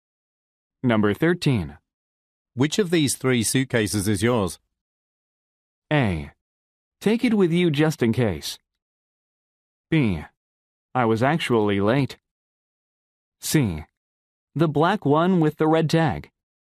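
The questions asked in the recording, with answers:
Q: Which of these 3 suitcases is yours?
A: C: The black one with the red tag.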